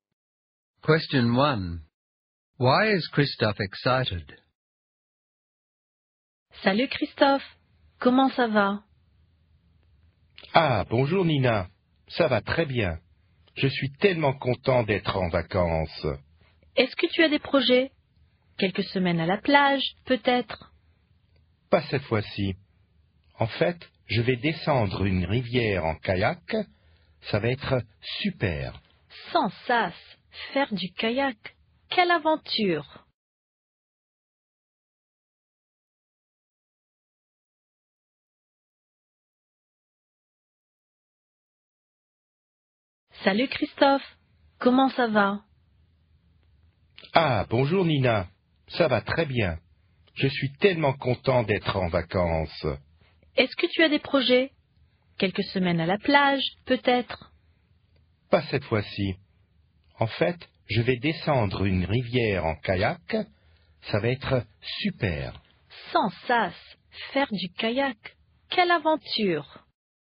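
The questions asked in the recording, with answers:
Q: Why is Christophe excited?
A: He is on holiday and is going to go down a river by kayak.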